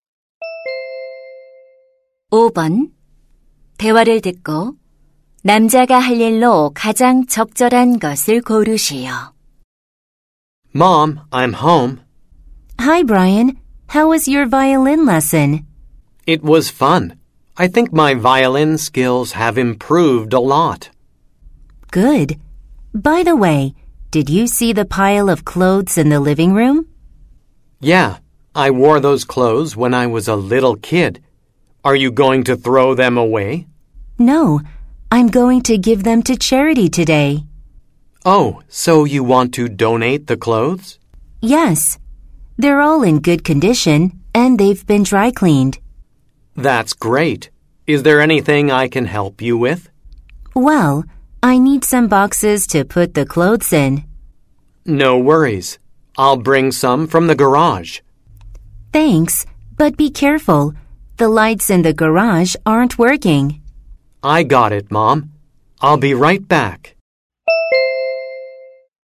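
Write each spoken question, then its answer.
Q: 대화를 듣고 남자가 할 일로 가장 적절한 것을 고르시오.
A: 차고에서 상자 가져오기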